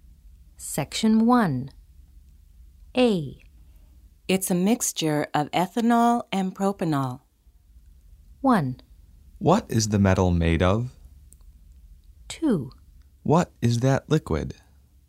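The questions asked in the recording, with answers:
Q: It's a mixture of ethanol and propanol.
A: 2: What is that liquid?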